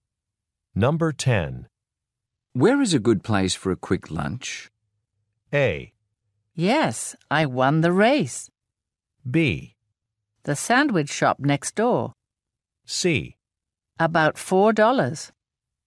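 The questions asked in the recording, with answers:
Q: Where is a good place for a quick lunch?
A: B: The sandwich shop next door.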